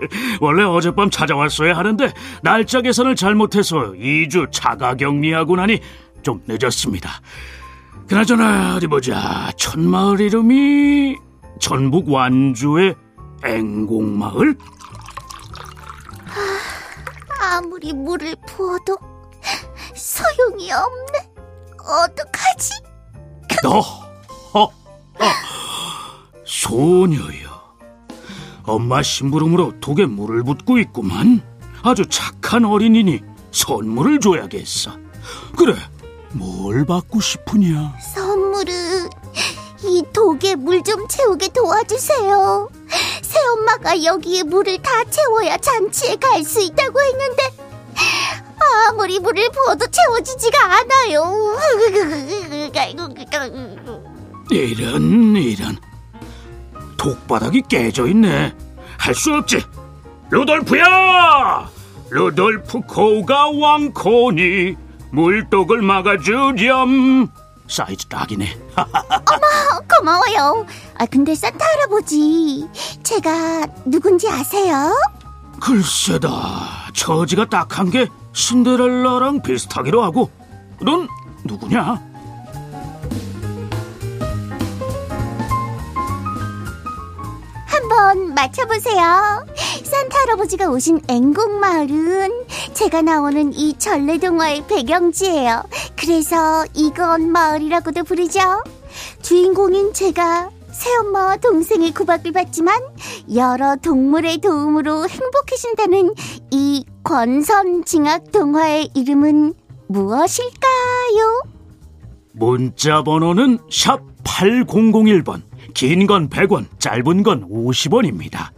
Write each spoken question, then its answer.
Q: 주인공인 제가 새엄마와 동생의 구박을 받지만 여러 동물의 도움으로 행복해진다는 이 권선징악 동화의 이름은 무엇일까요?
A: 전북 완주의 앵곡마을이 배경인 전래동화의 이름은 바로 콩쥐팥쥐입니다.